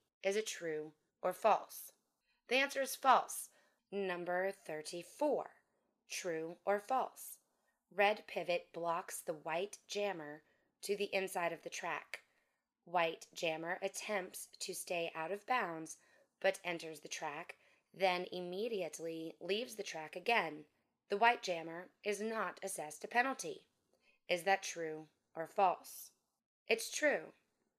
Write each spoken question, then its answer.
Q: The white jammer is not assessed a penalty.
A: It's true.